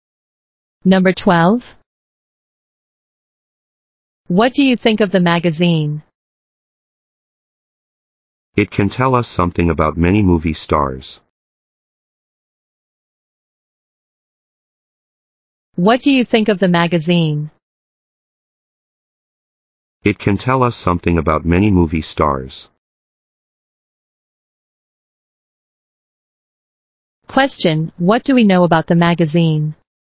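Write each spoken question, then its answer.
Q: what do we know about the magazine?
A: It tells us something about many movie stars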